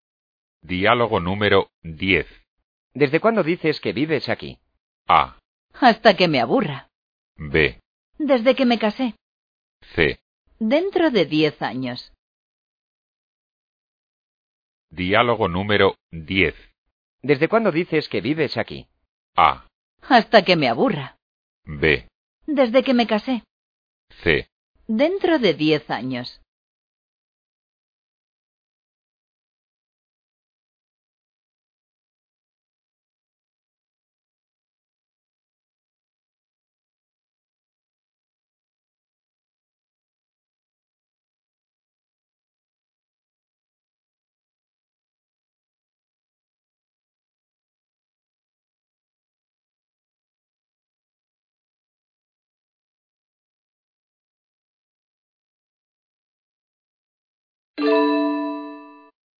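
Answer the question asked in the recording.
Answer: B: Desde que me casé.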